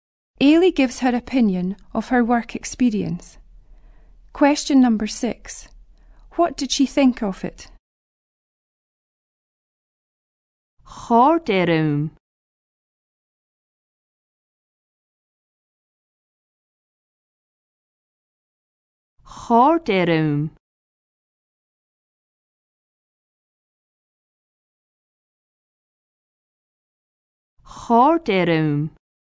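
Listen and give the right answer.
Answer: She enjoyed it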